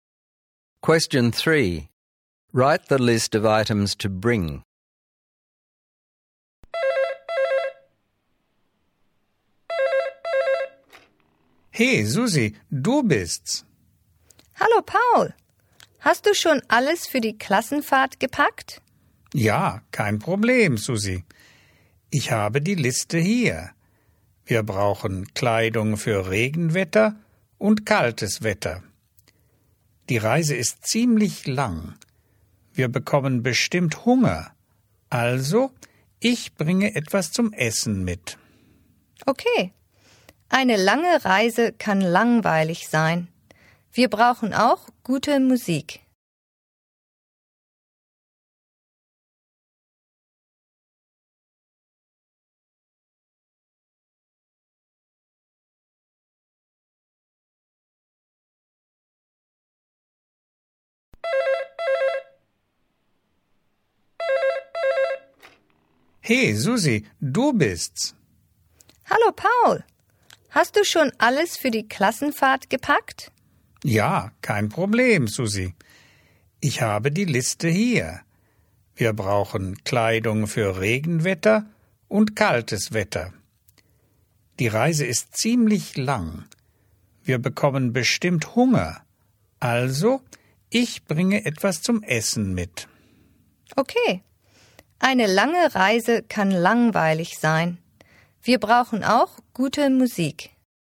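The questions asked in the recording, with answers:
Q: Write the list of items to bring.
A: Clothes for rainy and cold weather, something to eat, good music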